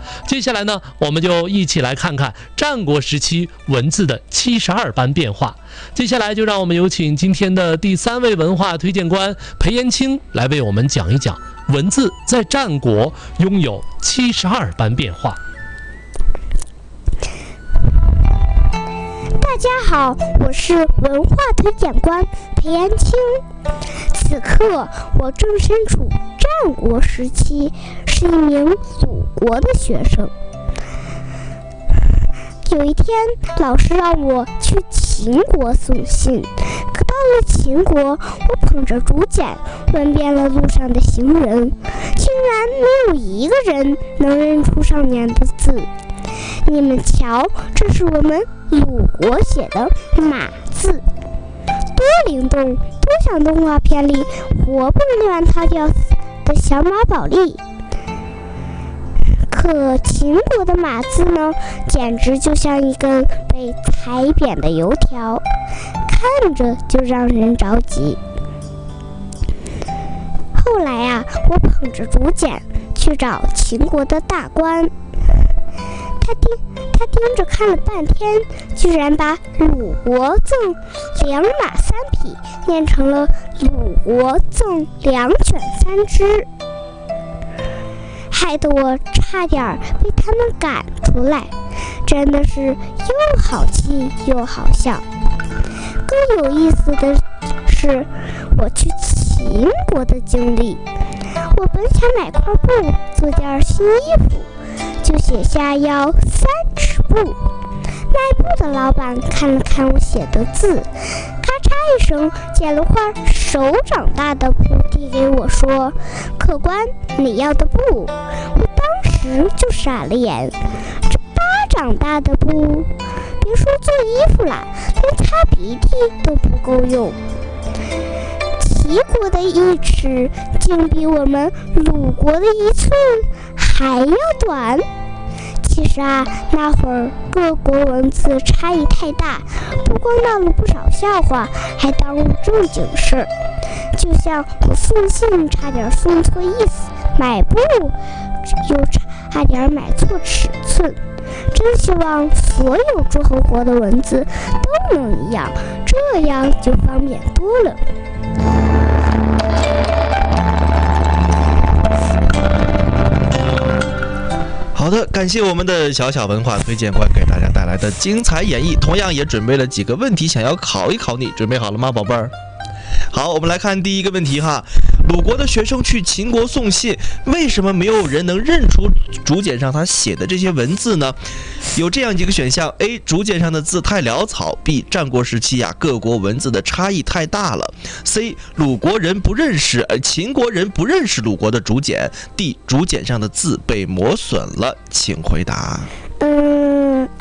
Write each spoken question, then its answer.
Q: 鲁国的学生去秦国送信,为什么没有人能认出竹简上他写的这些文字呢?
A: 第二个,战国时期各国的文字差异太大了,对不对?